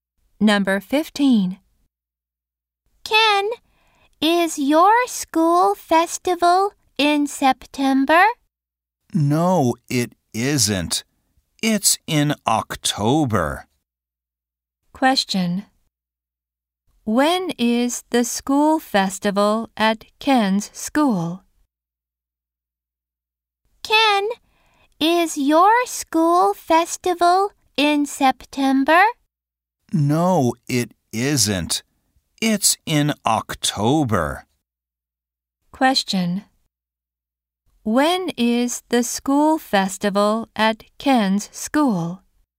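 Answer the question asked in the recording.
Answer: In October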